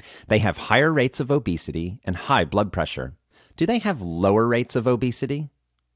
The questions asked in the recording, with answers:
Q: Do they have lower rates of obesity?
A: No, they do not have lower rates of obesity.